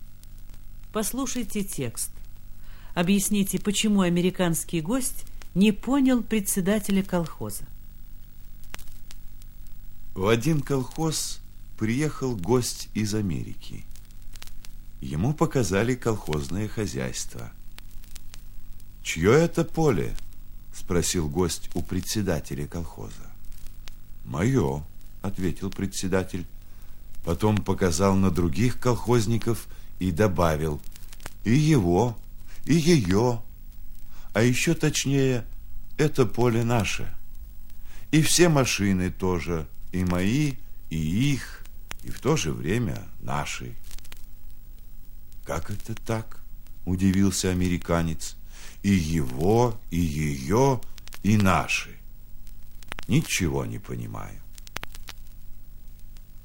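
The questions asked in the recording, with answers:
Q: Объясните, почему американский гость не понял председателя колхоза.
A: Поле и машины в колхозе общие: они принадлежат всем колхозникам сразу, а американец к такому не привык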